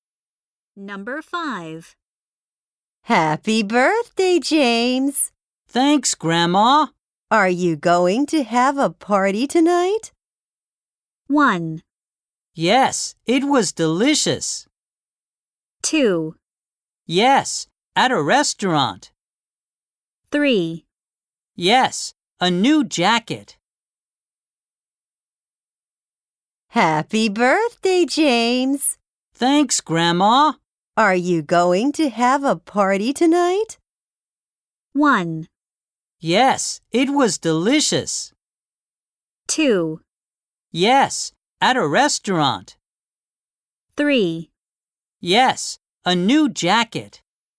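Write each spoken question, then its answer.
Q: Are you going to have a party tonight?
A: 2: Yes, at a restaurant.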